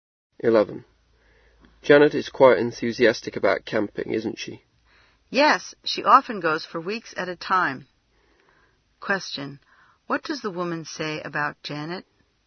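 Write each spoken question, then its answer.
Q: What does the woman say about Janet?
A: She often goes camping for weeks at a time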